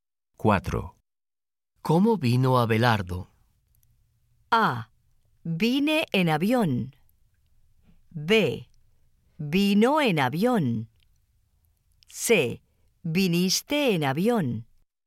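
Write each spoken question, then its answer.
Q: ¿Cómo vino Abelardo?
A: B: Vino en avión.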